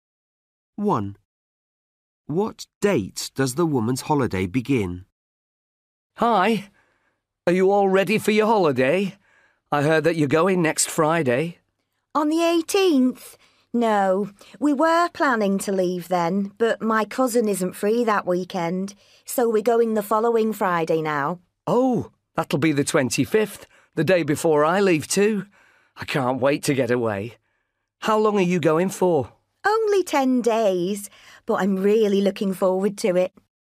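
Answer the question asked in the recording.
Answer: the 25th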